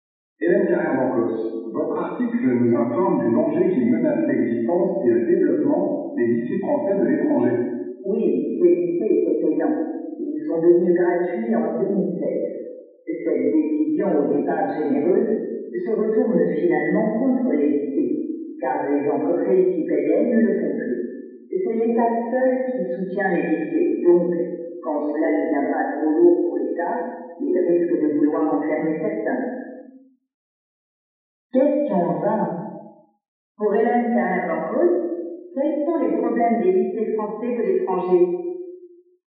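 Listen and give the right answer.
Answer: Depuis qu'ils sont gratuits, les entreprises ne paient plus ; l'État seul les finance et risque d'en fermer certains.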